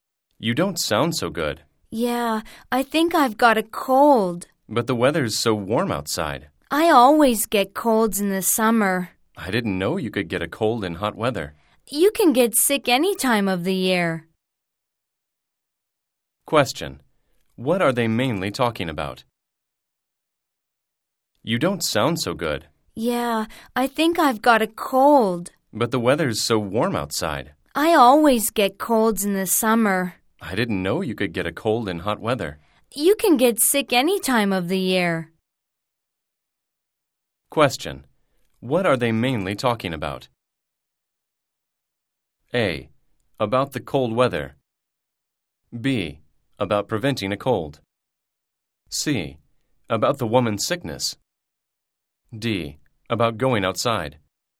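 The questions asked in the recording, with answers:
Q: What are they mainly talking about?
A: C: About the woman's sickness.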